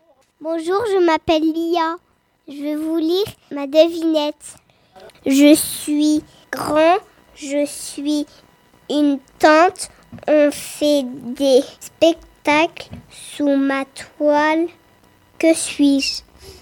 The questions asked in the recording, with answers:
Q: Que suis-je?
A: Un chapiteau.